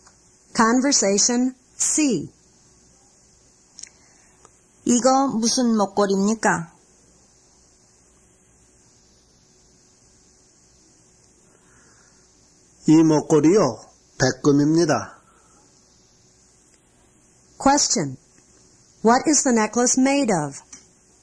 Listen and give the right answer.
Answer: 'It's made of platinum.